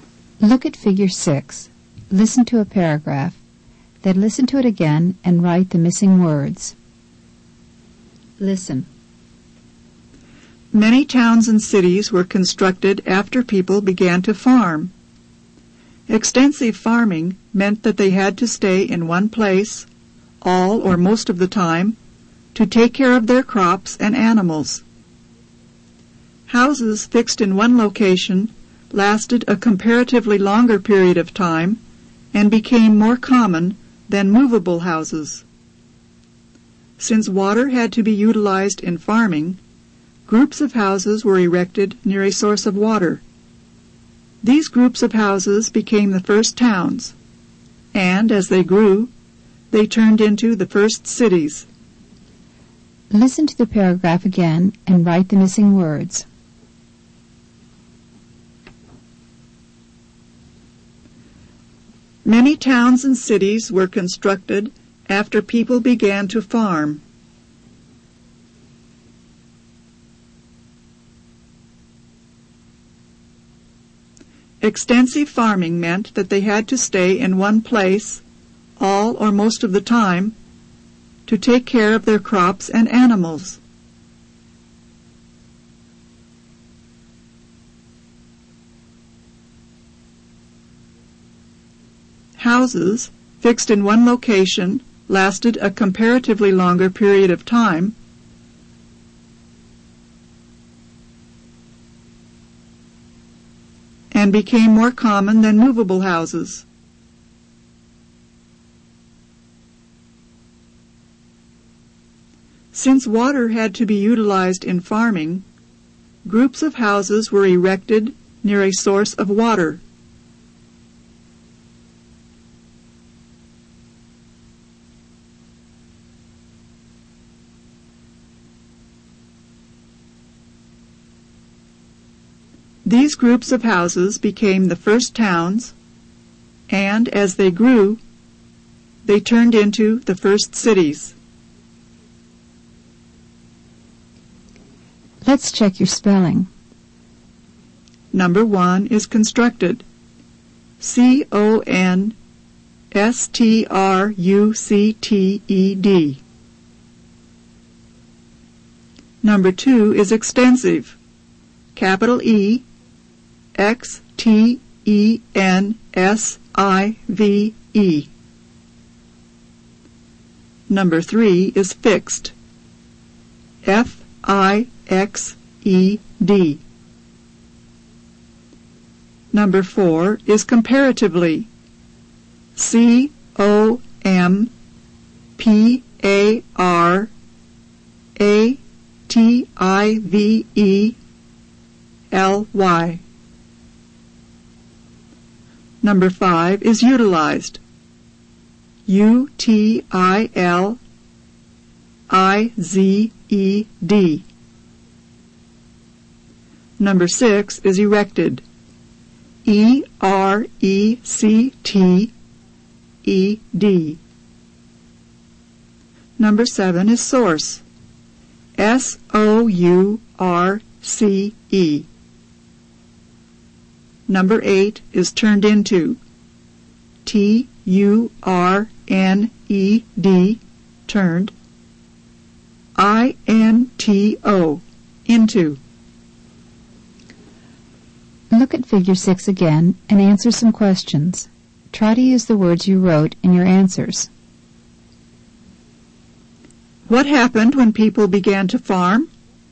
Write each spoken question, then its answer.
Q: What happened when people began to farm?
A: Many towns and cities were constructed.